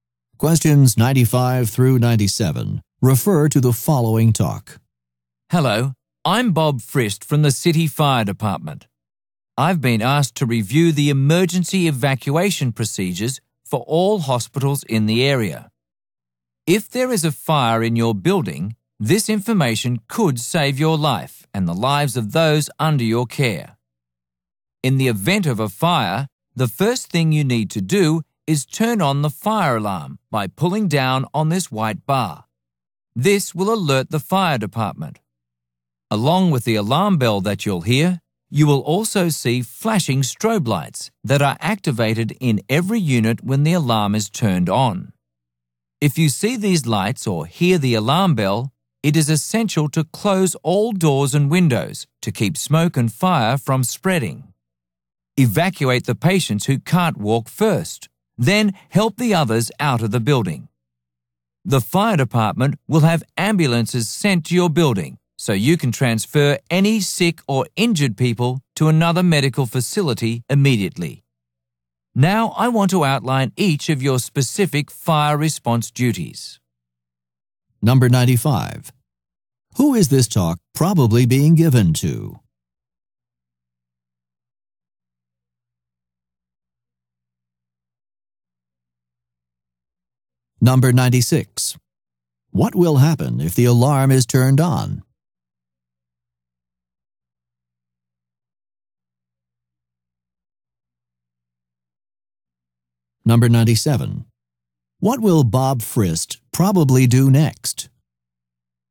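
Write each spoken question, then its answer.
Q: Who is this talk probably being given to?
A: Hospital staff

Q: What will happen if the alarm is turned on?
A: The fire department is alerted and strobe lights flash

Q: What will Bob Frist probably do next?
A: Outline each person's specific fire response duties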